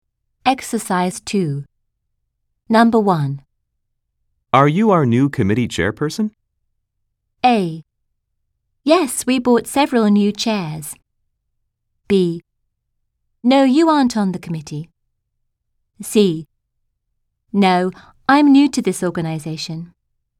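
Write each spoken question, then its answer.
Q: Are you our new committee chairperson?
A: C: No, I'm new to this organization.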